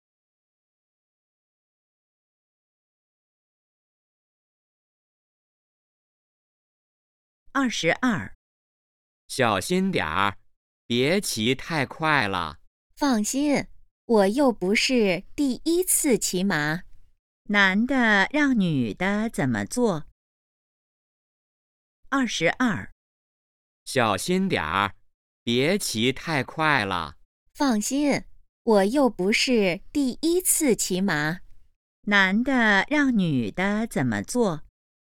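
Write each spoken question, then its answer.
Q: 男的让女的怎么做?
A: 别骑太快,小心点儿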